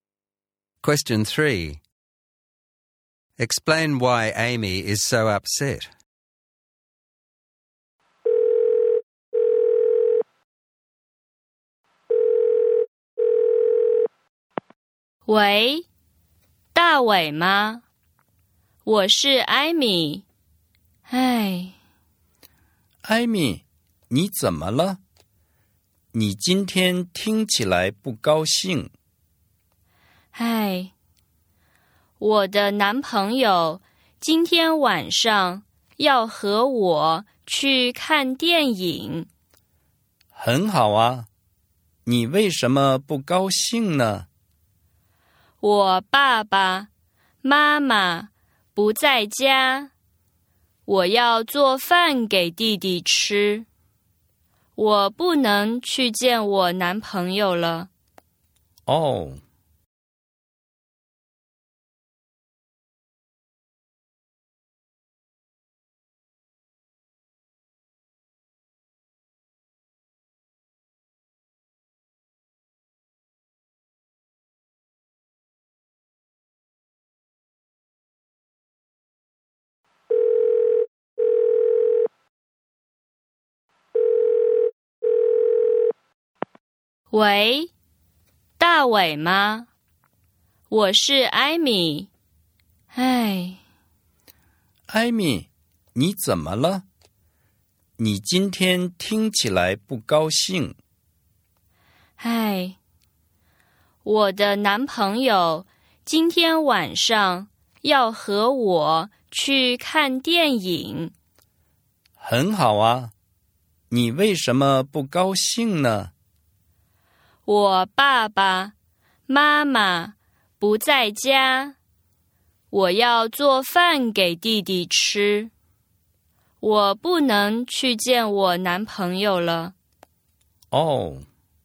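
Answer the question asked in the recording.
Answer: Her parents are not home and she has to cook for her younger brother, so she can't go to the movies with her boyfriend tonight.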